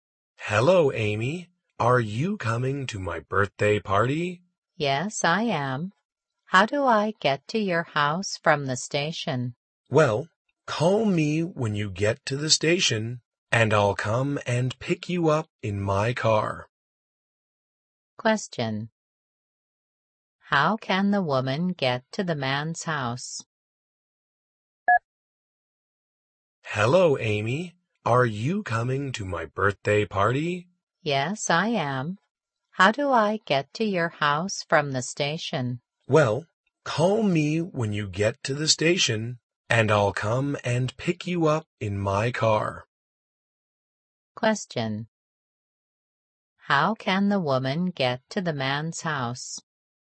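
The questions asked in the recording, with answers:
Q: How can the woman get to the man's house?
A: The man will pick her up in his car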